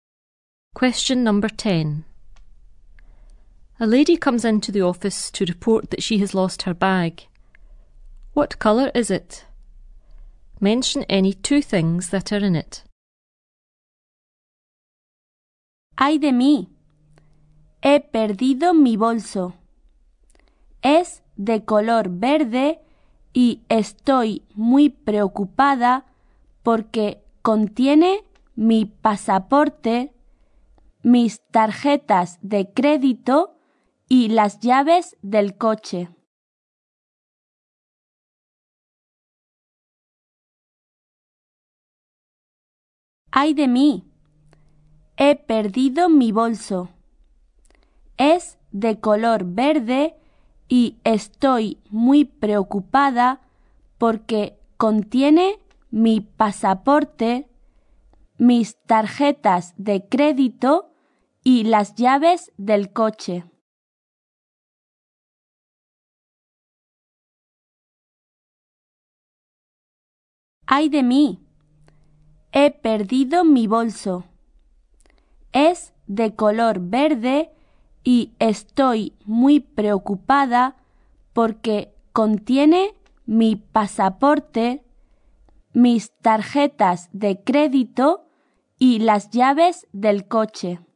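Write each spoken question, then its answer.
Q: What colour is it?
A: Green

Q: Mention any two things that are in it.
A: Passport, credit cards, car keys (any two)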